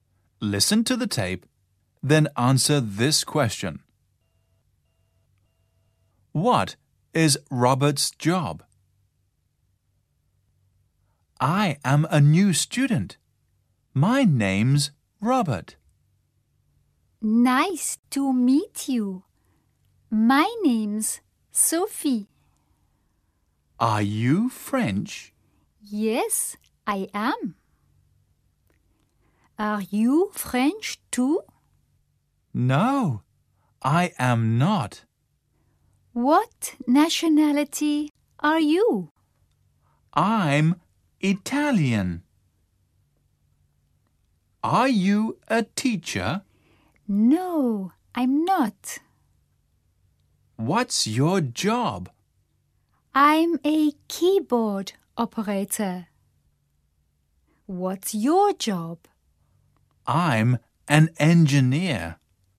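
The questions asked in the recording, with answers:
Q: What is Robert's job?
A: He's an engineer.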